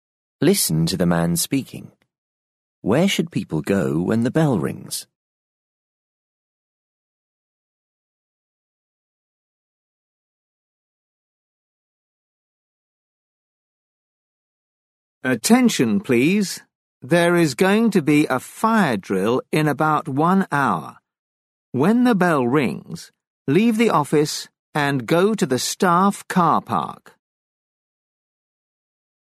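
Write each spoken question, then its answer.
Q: Where should people go when the bell rings?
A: to the staff car park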